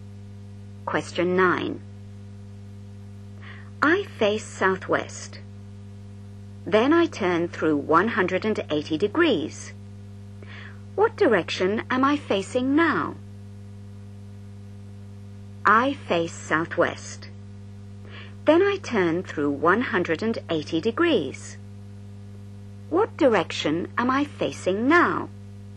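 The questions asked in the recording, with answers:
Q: What direction am I facing now?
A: Northeast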